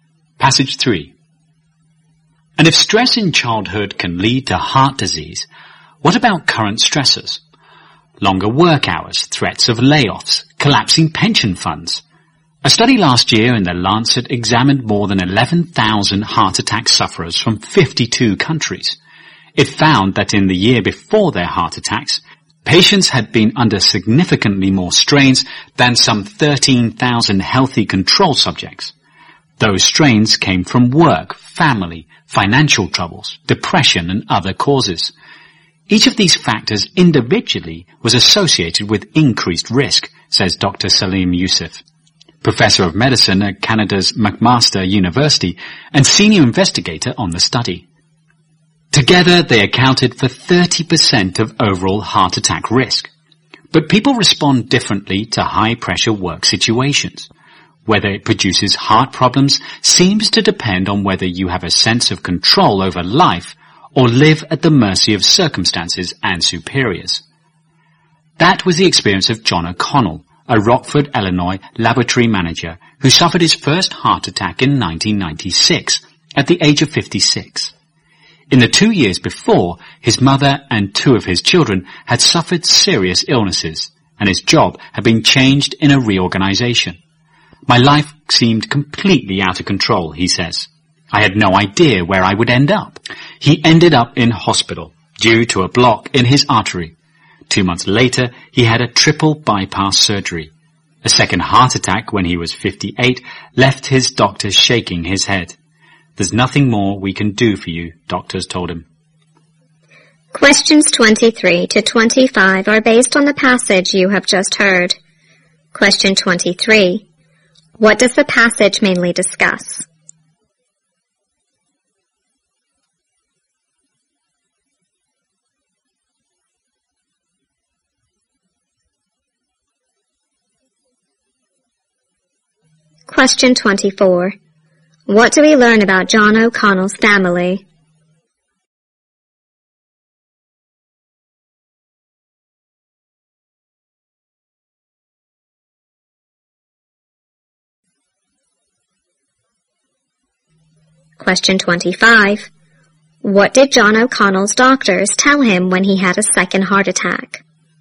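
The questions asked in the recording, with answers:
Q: What does the passage mainly discuss?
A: The link between stress and heart disease

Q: What do we learn about John O'Connell's family?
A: His mother and two of his children suffered serious illnesses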